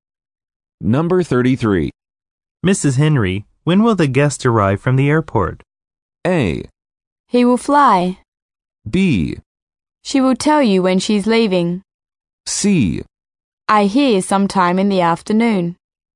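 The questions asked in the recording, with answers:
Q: Mrs. Henry, when will the guest arrive from the airport?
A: C: I hear sometime in the afternoon.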